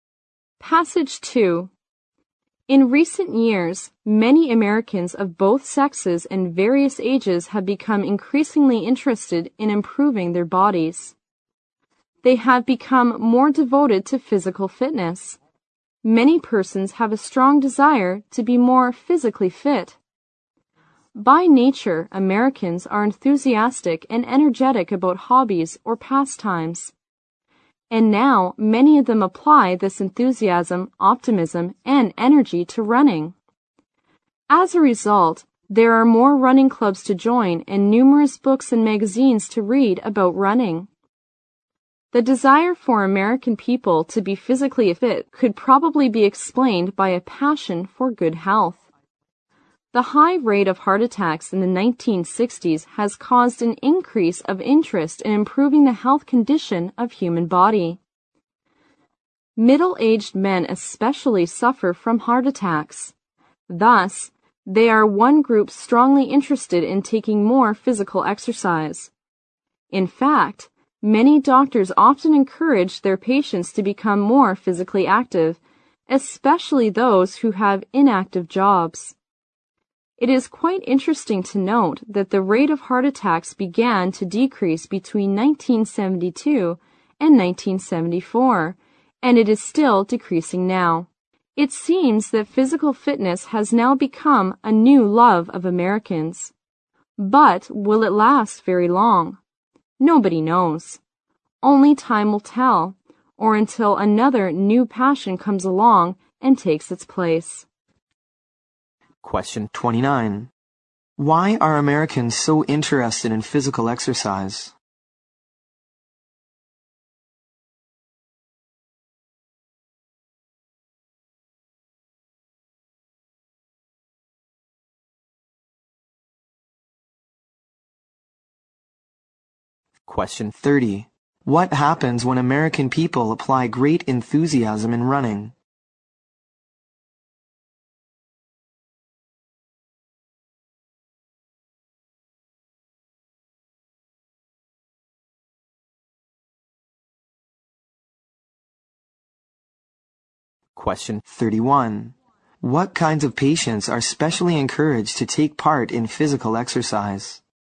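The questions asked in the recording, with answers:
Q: Why are Americans so interested in physical exercise?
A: Because of a passion for good health

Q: What happens when American people apply great enthusiasm in running?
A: There are more running clubs and numerous books and magazines about running

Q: What kinds of patients are specially encouraged to take part in physical exercise?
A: Those who have inactive jobs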